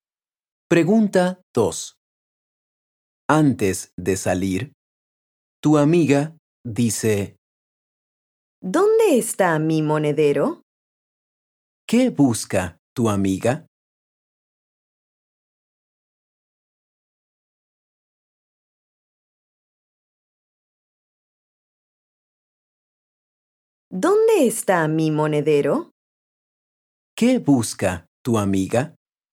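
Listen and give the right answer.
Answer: su monedero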